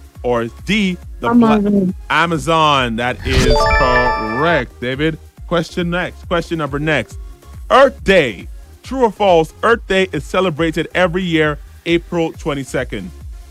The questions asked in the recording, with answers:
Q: True or false, Earth Day is celebrated every year, April 22nd.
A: The answer is true.